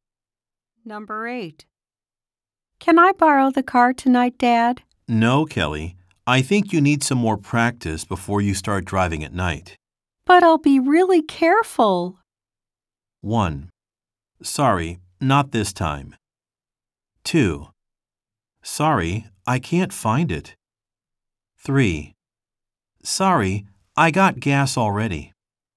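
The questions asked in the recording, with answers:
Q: But I'll be really careful.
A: 1: Sorry, not this time.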